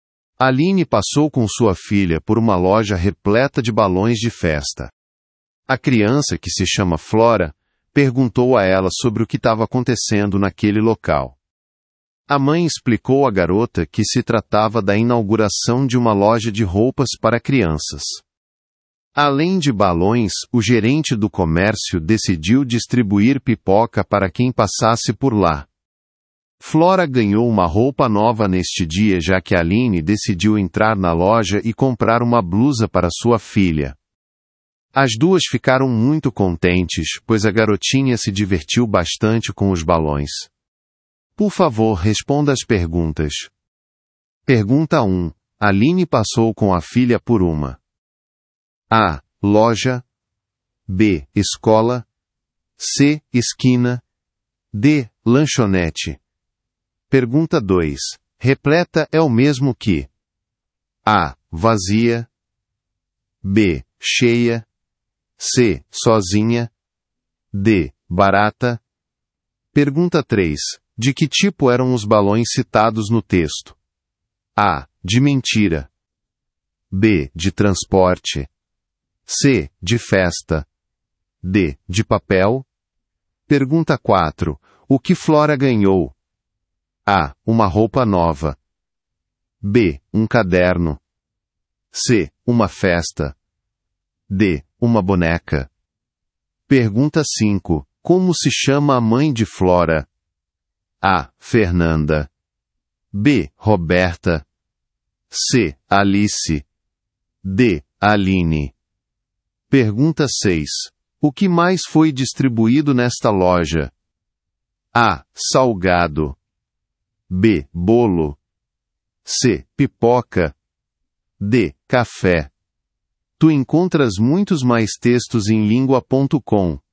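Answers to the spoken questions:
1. A: Loja
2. B: Cheia
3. C: De festa
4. A: Uma roupa nova
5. D: Aline
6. C: Pipoca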